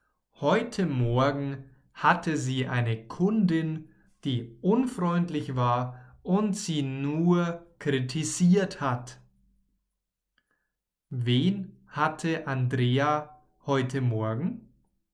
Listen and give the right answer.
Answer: Eine Kundin. Sie hatte heute Morgen eine Kundin.